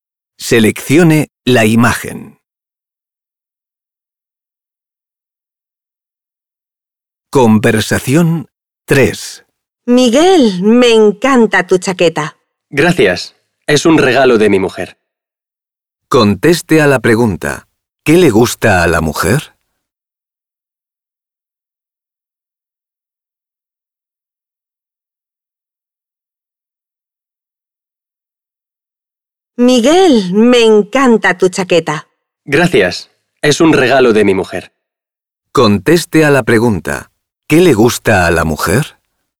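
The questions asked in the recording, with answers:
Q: ¿Qué le gusta a la mujer?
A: La chaqueta de Miguel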